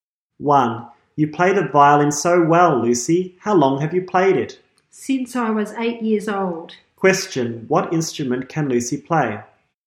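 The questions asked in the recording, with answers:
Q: Question, what instrument can Lucy play?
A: The violin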